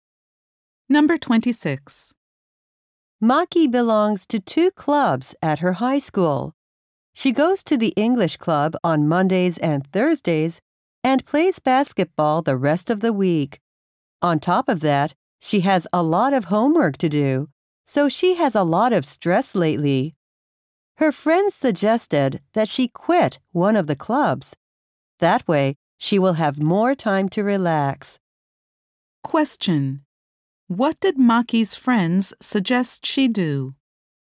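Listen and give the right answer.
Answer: Quit one of her clubs.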